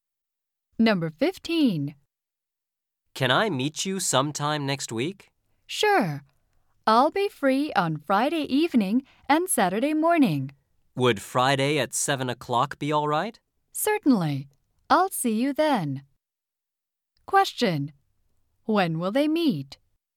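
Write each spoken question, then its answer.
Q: When will they meet?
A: Friday at 7 o'clock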